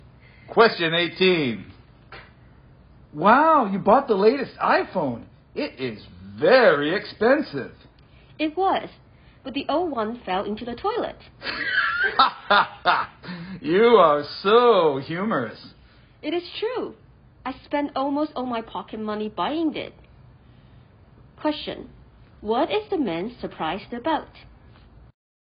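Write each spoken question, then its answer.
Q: What is the man surprised about?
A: That the woman bought the latest, very expensive iPhone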